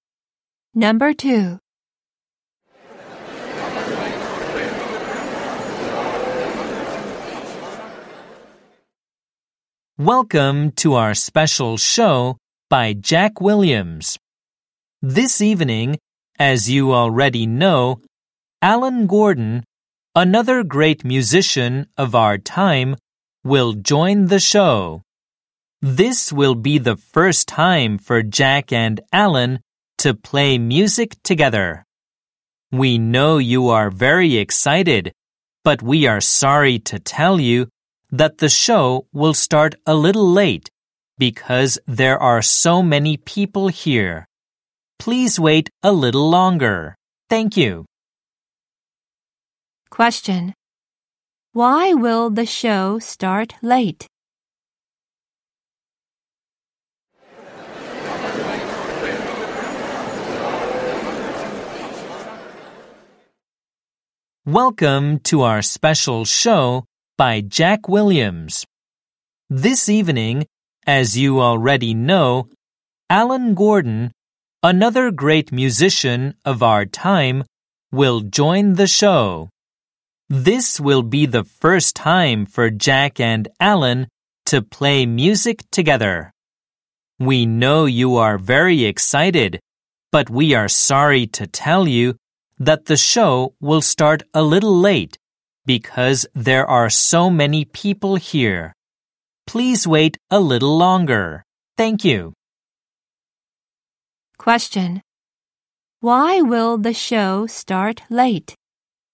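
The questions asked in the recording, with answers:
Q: Why will the show start late?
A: Because there are so many people there.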